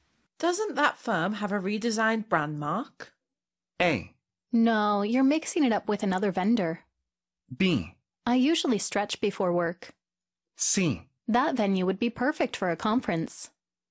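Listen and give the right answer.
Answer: A: No, you're mixing it up with another vendor.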